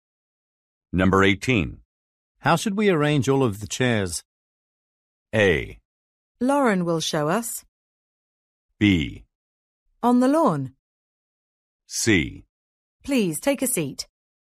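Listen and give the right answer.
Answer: A: Lauren will show us.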